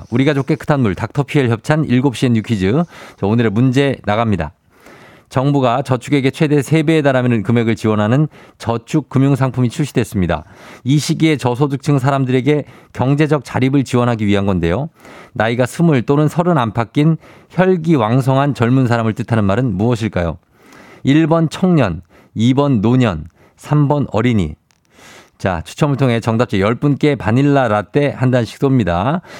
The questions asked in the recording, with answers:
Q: 나이가 20 또는 30 안팎인 혈기왕성한 젊은 사람을 뜻하는 말은 무엇일까요?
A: 정답 일번 청년입니다.